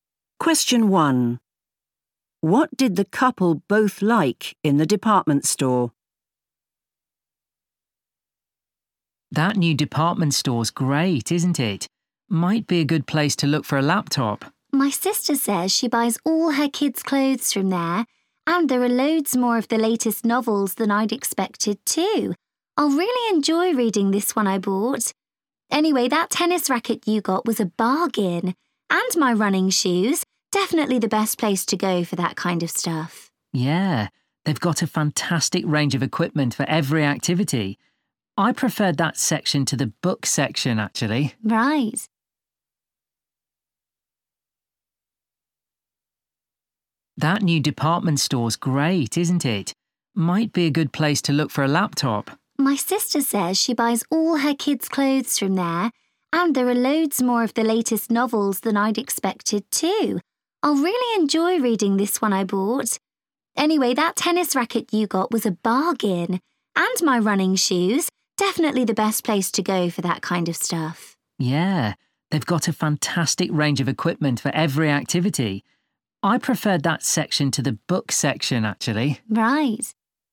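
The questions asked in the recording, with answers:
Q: What did the couple both like in the department store?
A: the sports equipment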